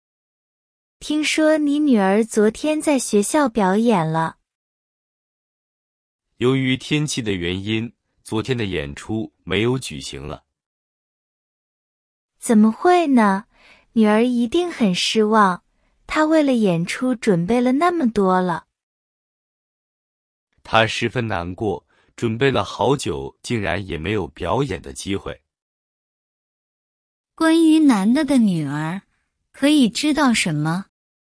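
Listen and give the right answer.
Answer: 她很难过,因为天气原因演出没有举行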